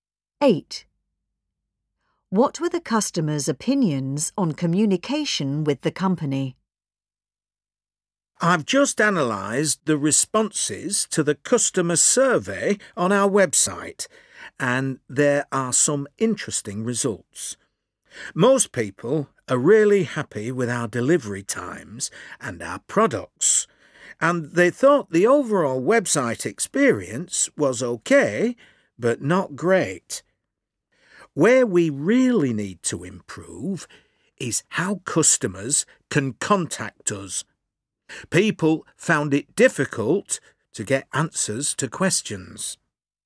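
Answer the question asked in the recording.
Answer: It was difficult to contact the company and get answers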